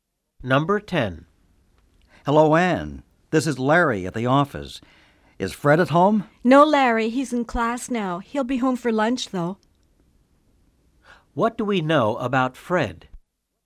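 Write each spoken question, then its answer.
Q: What do we know about Fred?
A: He is in class now and will be home for lunch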